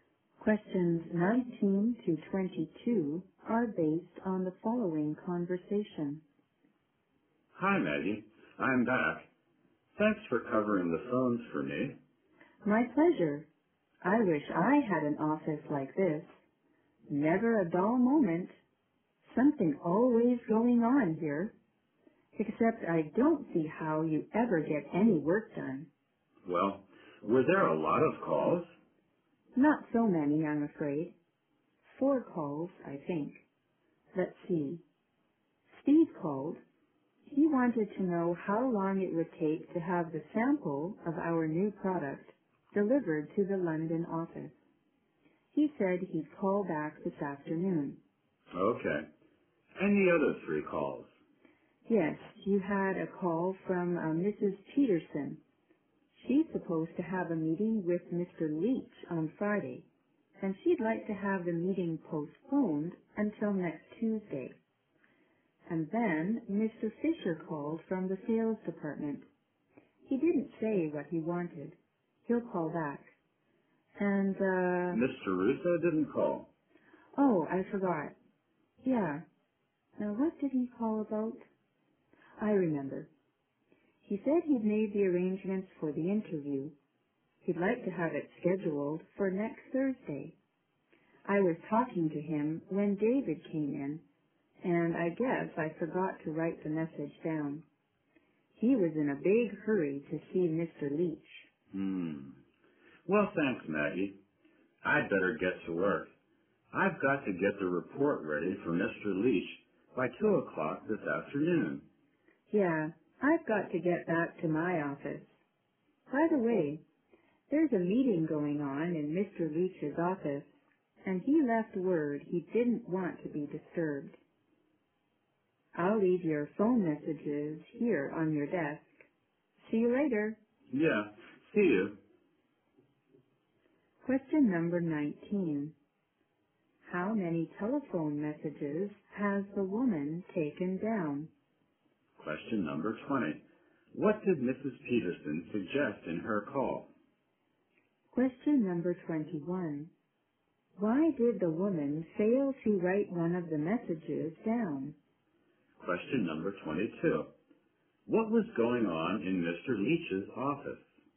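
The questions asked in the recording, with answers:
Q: What did Mrs. Peterson suggest in her call?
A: Postponing her Friday meeting with Mr. Leach until next Tuesday

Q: Why did the woman fail to write one of the messages down?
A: David came in while she was talking on the phone

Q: What was going on in Mr. Leach's office?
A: A meeting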